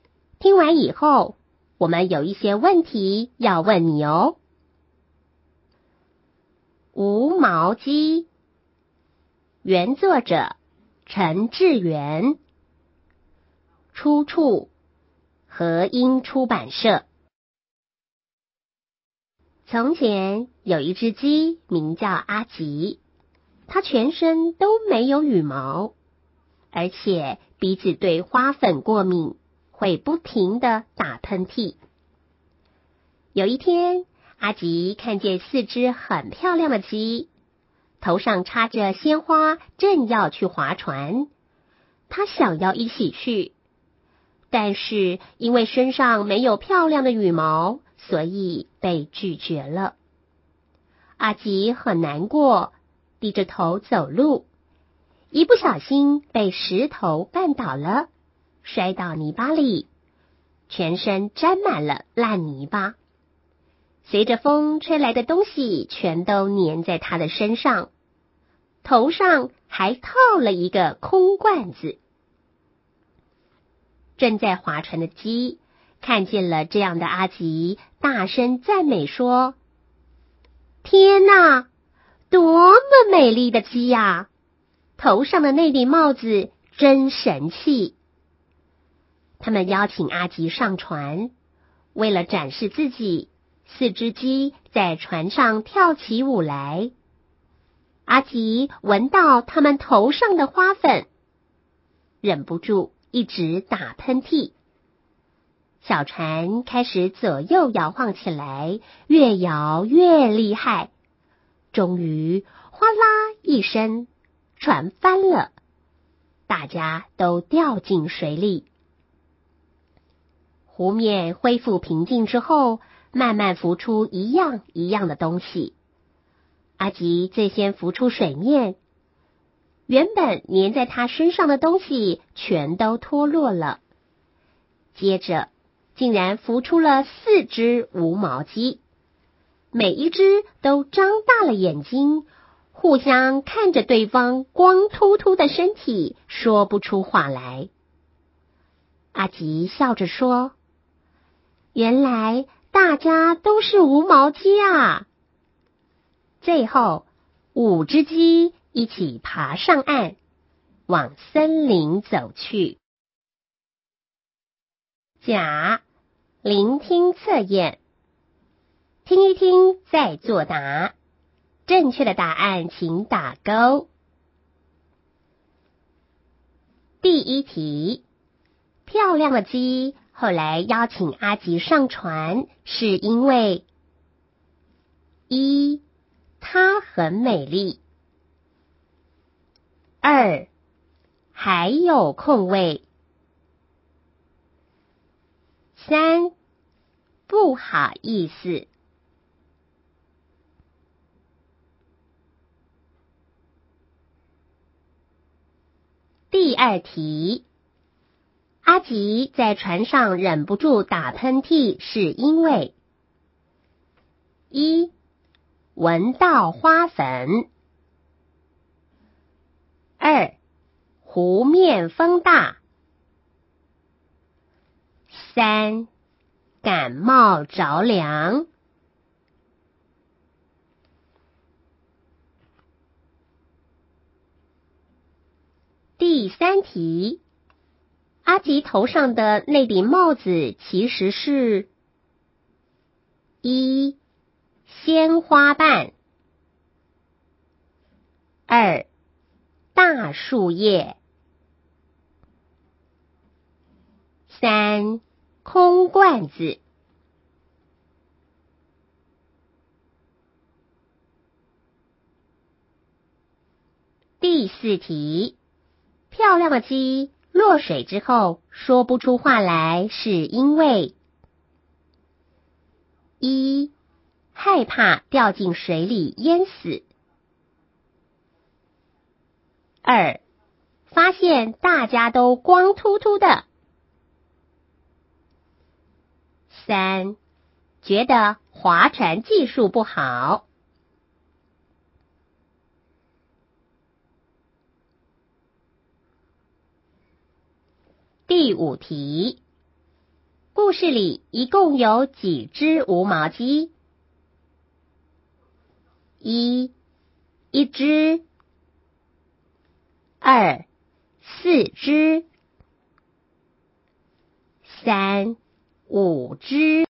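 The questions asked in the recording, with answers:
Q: 漂亮的鸡后来邀请阿吉上船,是因为:一,它很美丽;二,还有空位;三,不好意思。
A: 一:它很美丽

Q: 阿吉在船上忍不住打喷嚏是因为:一,闻到花粉;二,湖面风大;三,感冒着凉。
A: 一:闻到花粉

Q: 阿吉头上的那顶帽子其实是一鲜花瓣,二大树叶,三空罐子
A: 三:空罐子

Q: 漂亮的鸡落水之后说不出话来是因为一害怕掉进水里淹死,二发现大家都光秃秃的,三觉得划船技术不好。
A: 二:发现大家都光秃秃的

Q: 故事里一共有几只无毛鸡?一,一只;二,四只;三,五只。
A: 三:五只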